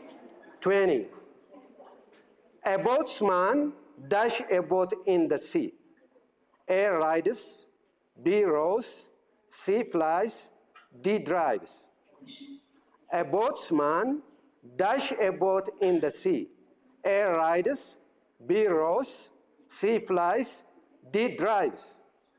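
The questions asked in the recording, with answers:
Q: A boatsman dash a boat in the sea.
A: B: rows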